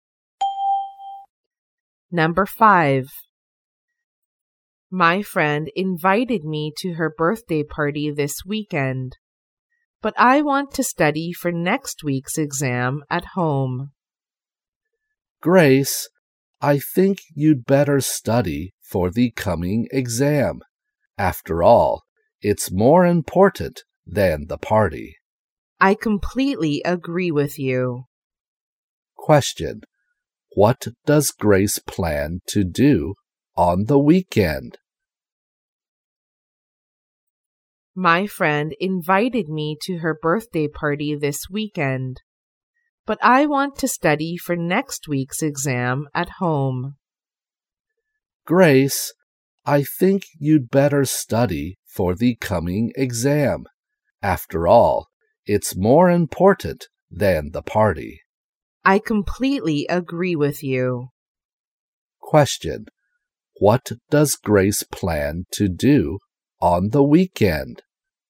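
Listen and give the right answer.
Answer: Study for next week's exam at home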